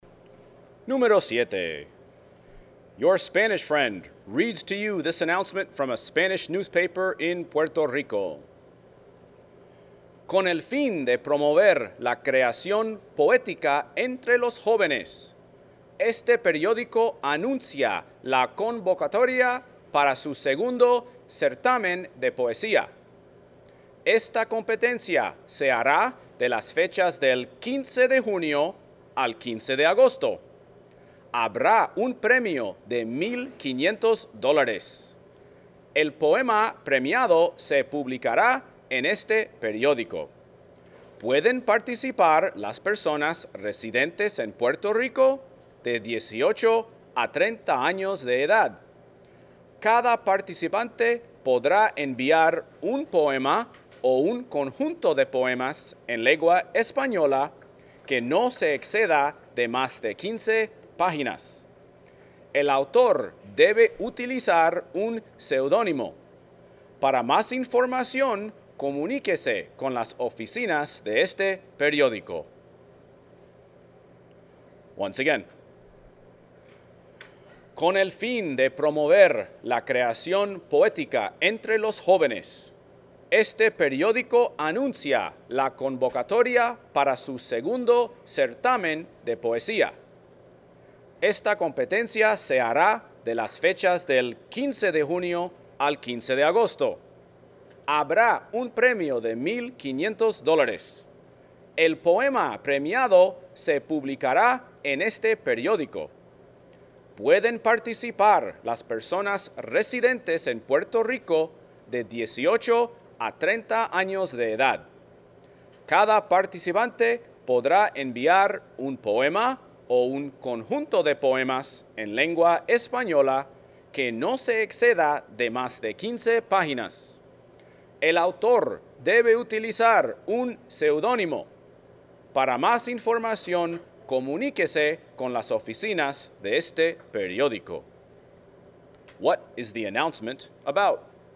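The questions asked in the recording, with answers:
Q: What is the announcement about?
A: A poetry contest for young people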